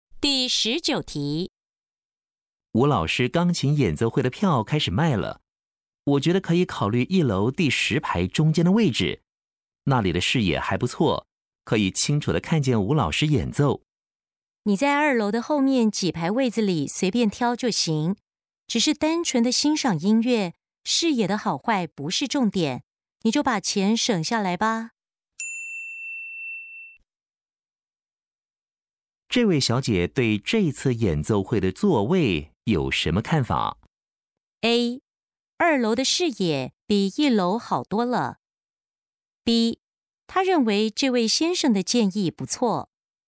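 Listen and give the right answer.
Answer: D: 没必要考虑能不能看见表演者。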